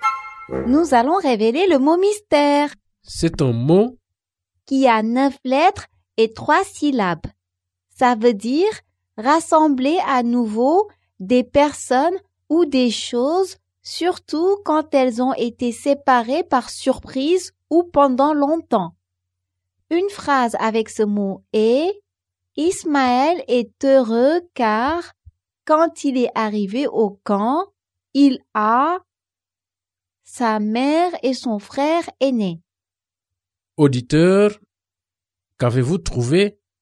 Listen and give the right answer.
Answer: Le mot mystère est « retrouver ».